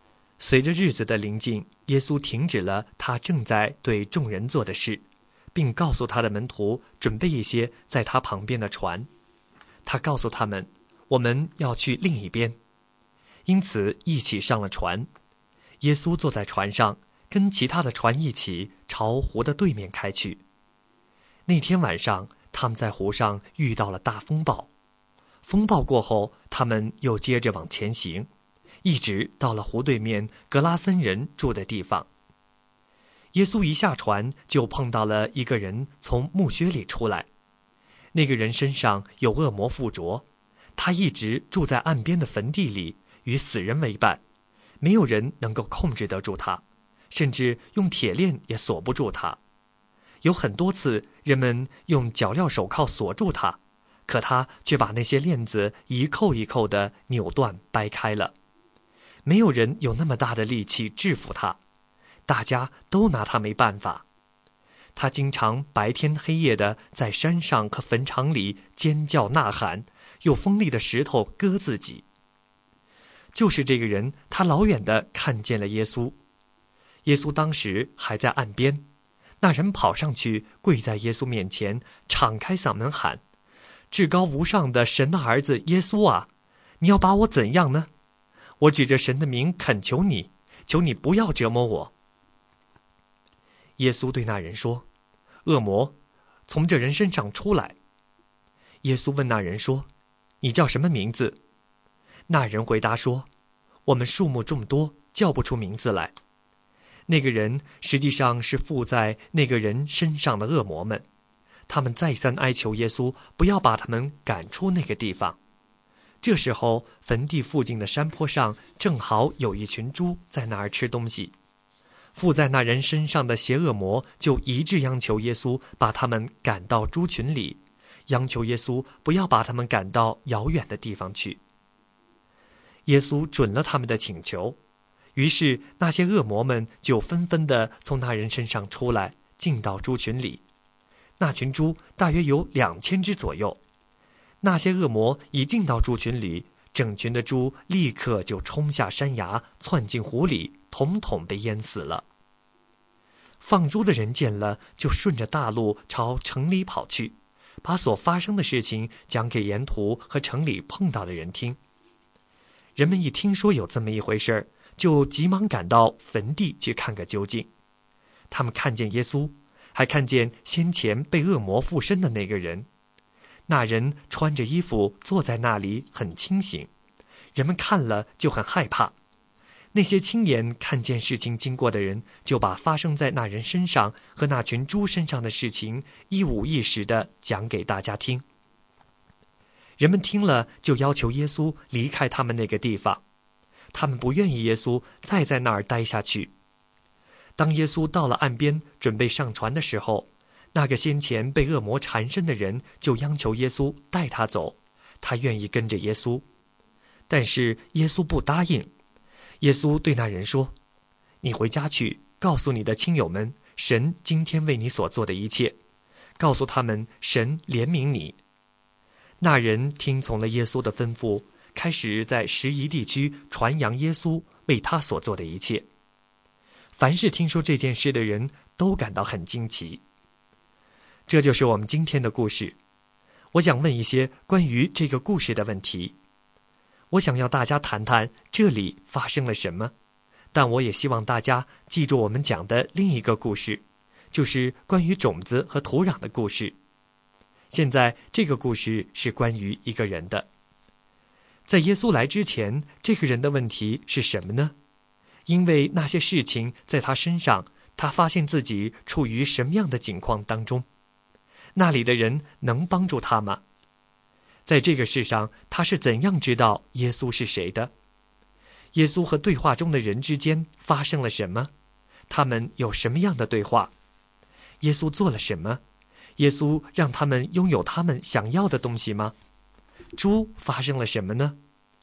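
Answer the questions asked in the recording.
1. 他被恶魔附身,住在坟地里,没有人能制服他
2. 不能,没有人能制服他,连铁链也锁不住他
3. 是的,耶稣准许恶魔进入猪群
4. 大约2000只猪冲下山崖,窜进湖里淹死了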